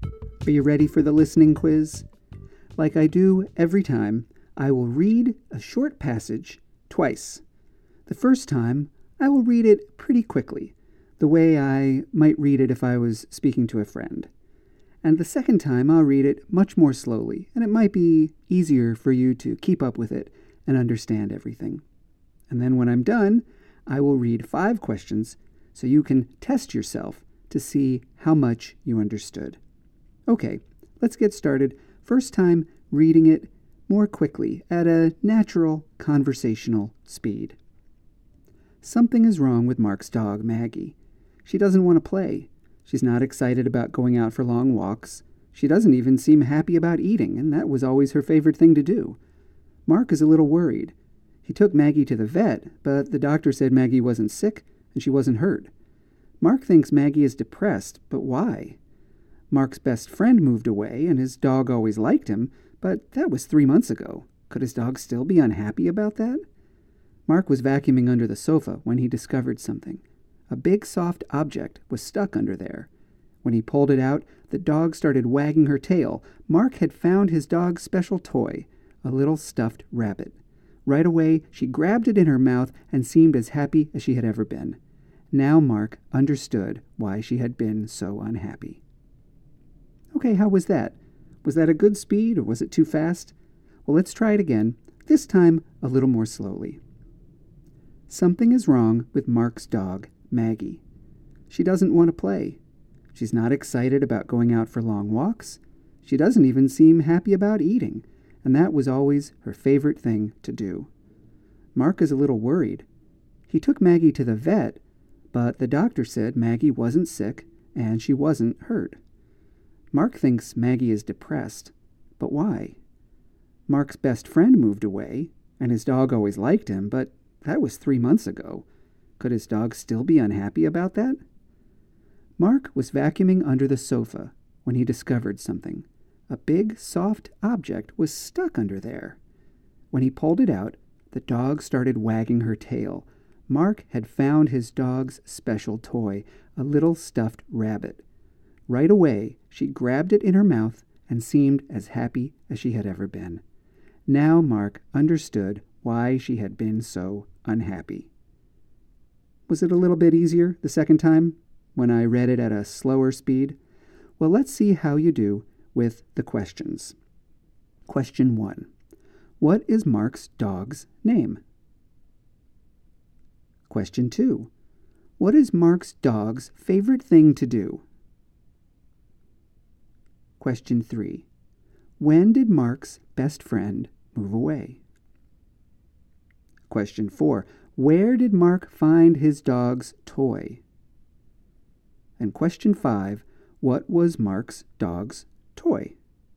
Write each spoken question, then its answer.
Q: What is Mark's dog's name?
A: His dog's name is Maggie.

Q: What is Mark's dog's favorite thing to do?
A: Her favorite thing to do is eat, which makes her similar to most dogs I've known in my life.

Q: When did Mark's best friend move away?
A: His best friend moved away 3 months ago.

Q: Where did Mark find his dog's toy?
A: He found it under the sofa when he was vacuuming.

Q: What was Mark's dog's toy?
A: It was a little stuffed rabbit.